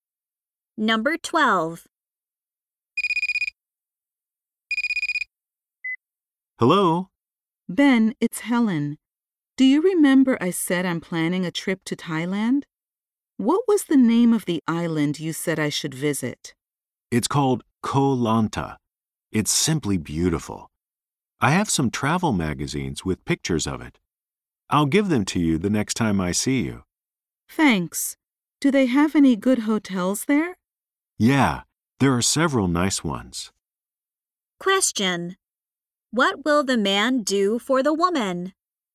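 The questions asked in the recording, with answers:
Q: What will the man do for the woman?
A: Give her some travel magazines.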